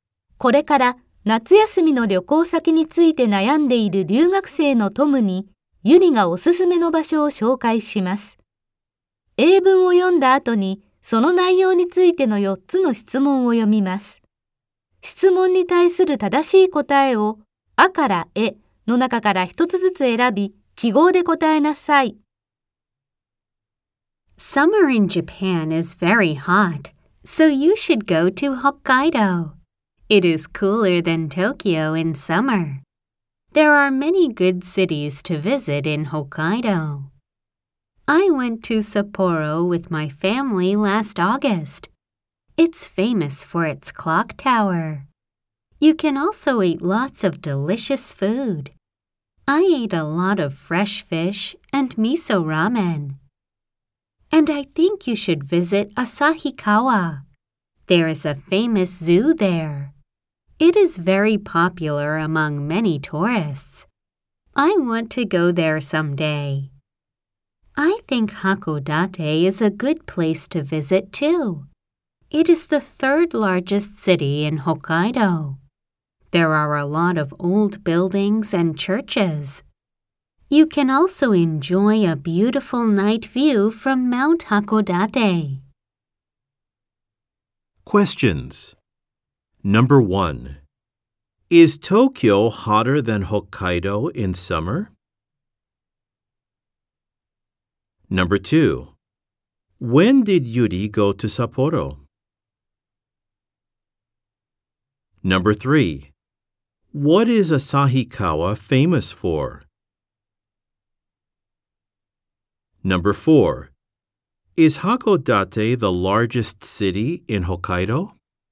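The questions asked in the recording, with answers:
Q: Is Tokyo hotter than Hokkaido in summer?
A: Yes, it is.

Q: When did Yuri go to Sapporo?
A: Last August.

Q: What is Asahikawa famous for?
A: A famous zoo.

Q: Is Hakodate the largest city in Hokkaido?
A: No, it isn't. It is the third largest.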